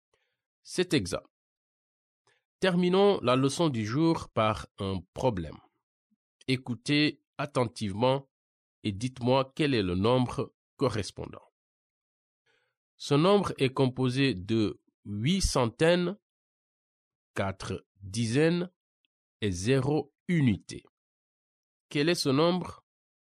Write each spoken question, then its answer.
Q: Quel est ce nombre?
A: Je pense que c'est 840 et ça s'écrit 8, 4, 0.